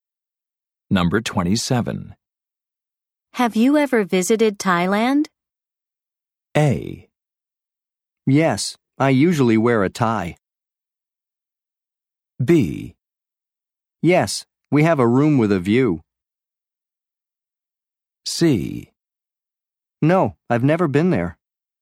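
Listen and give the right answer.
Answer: C: No, I've never been there.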